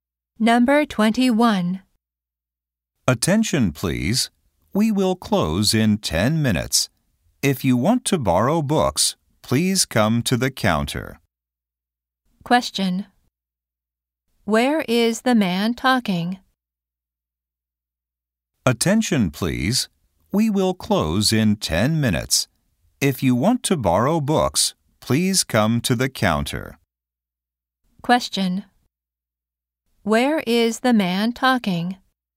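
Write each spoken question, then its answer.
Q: Question. Where is the man talking?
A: At a library.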